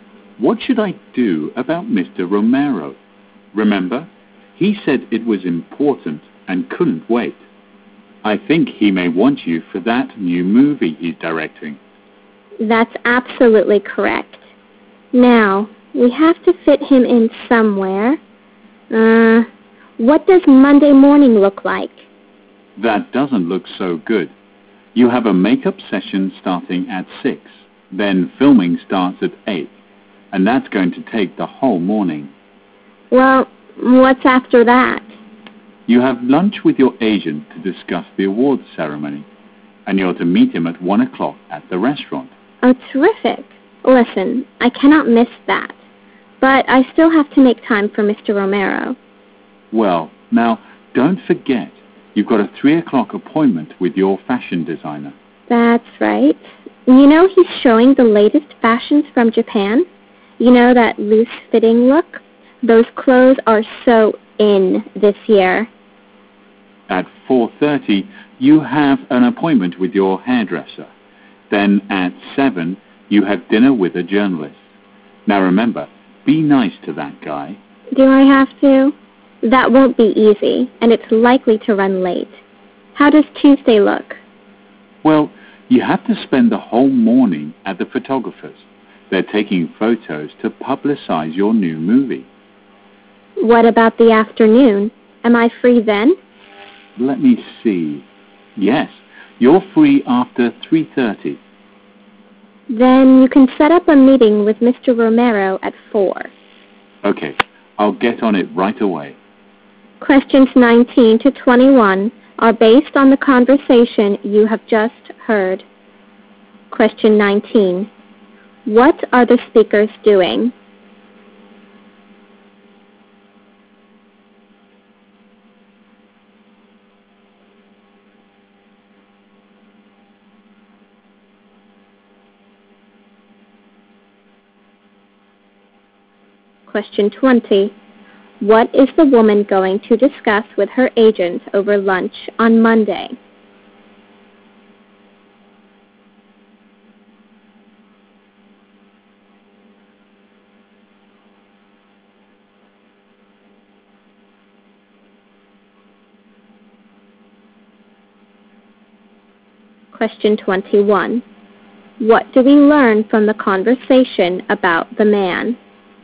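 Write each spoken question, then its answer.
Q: What are the speakers doing?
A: Arranging the woman's schedule.

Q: What is the woman going to discuss with her agent over lunch on Monday?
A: The awards ceremony.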